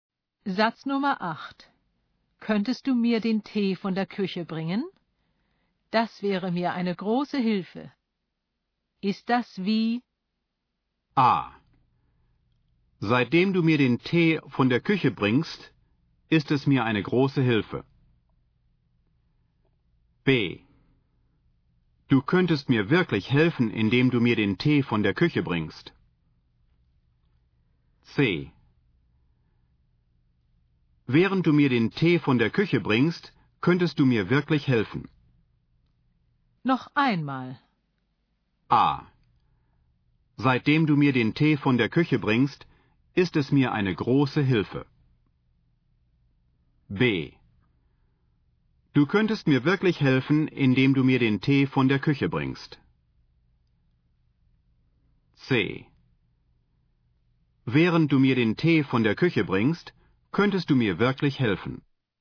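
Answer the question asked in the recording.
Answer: B: Du könntest mir wirklich helfen, indem du mir den Tee von der Küche bringst.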